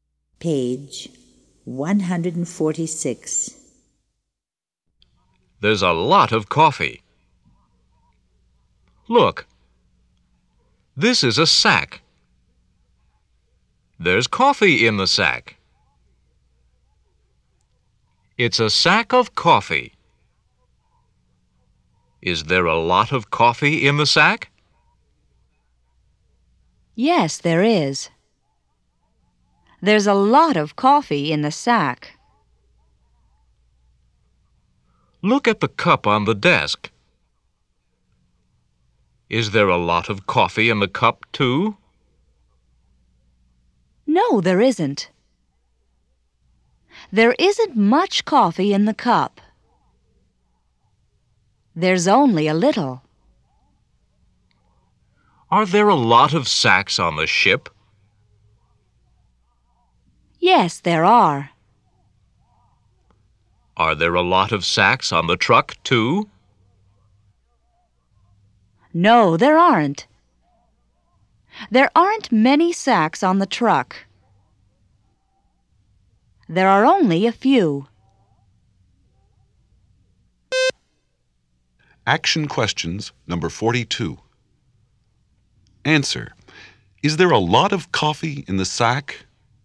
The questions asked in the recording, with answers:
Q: Is there a lot of coffee in the sack?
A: Yes, there is.